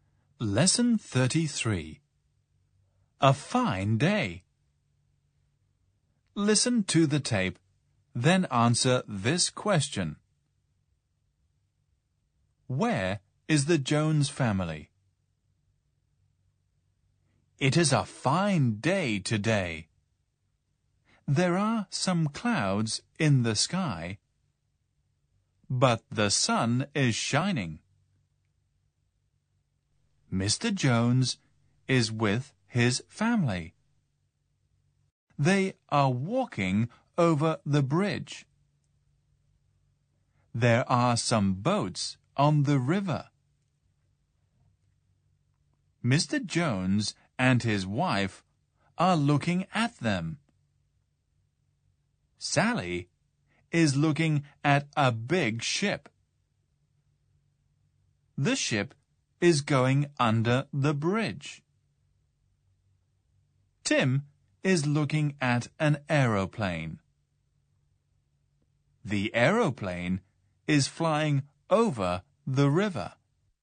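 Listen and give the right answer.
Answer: They are walking over the bridge.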